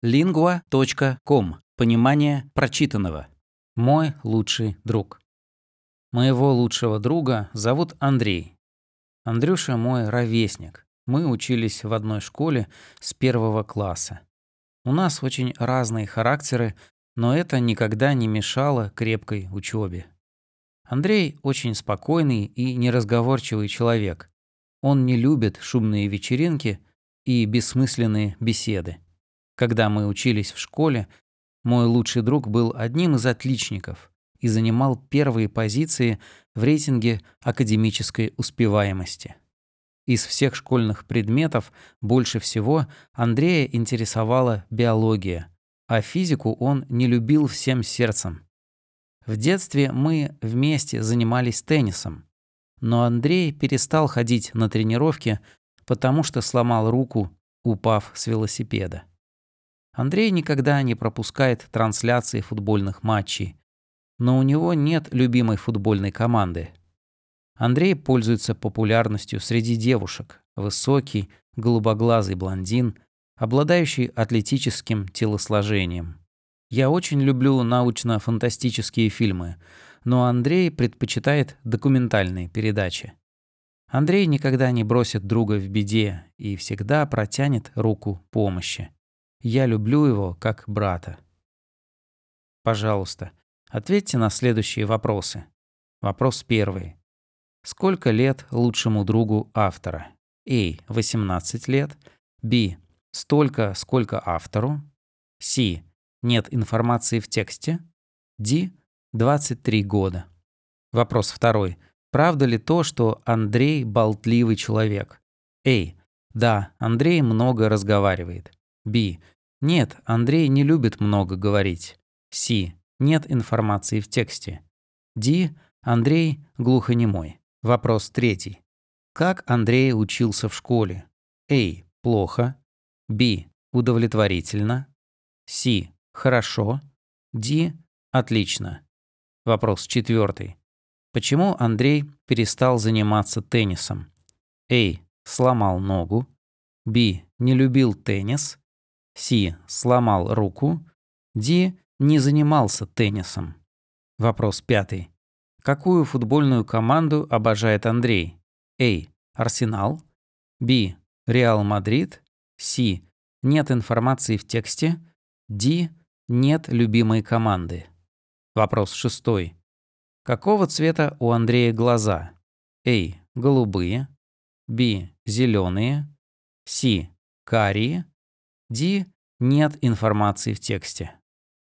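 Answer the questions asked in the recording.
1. B: Столько, сколько автору.
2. B: Нет, Андрей не любит много говорить.
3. D: Отлично.
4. C: Сломал руку.
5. D: Нет любимой команды.
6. A: Голубые.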